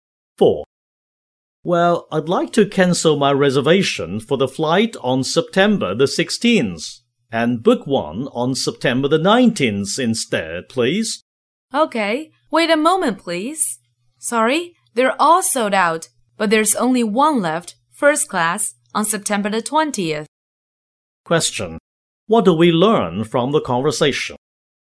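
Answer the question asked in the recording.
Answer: The September 19th flight is sold out; only one first-class seat on the 20th is left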